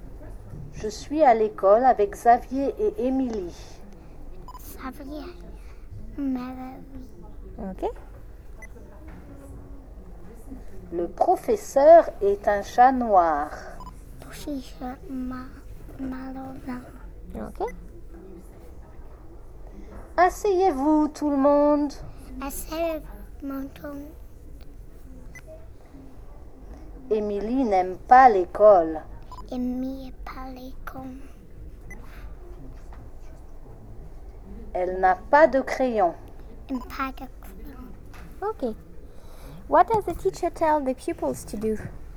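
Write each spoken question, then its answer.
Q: What does the teacher tell the pupils to do?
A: Sit down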